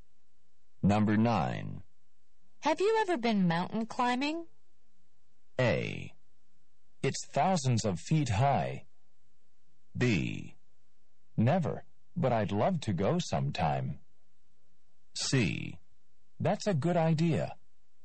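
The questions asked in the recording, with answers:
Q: Have you ever been mountain climbing?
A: B: Never, but I'd love to go sometime.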